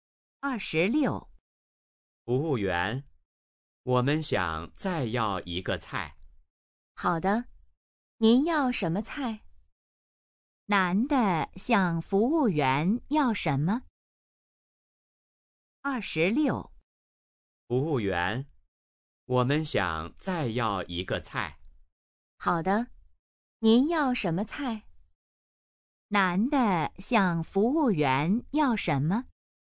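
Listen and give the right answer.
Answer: 再要一个菜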